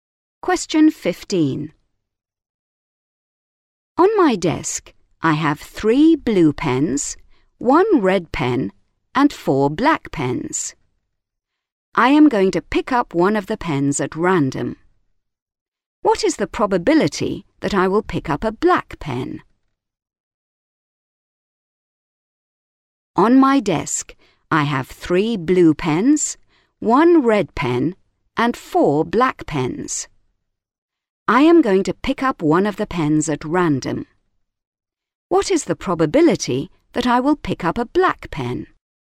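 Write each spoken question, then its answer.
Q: What is the probability that I will pick up a black pen?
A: 1/2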